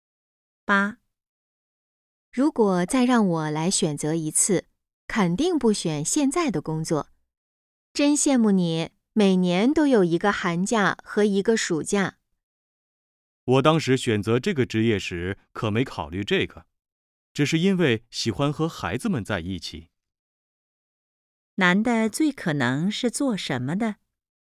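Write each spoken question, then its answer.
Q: 男的最可能是做什么的?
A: 老师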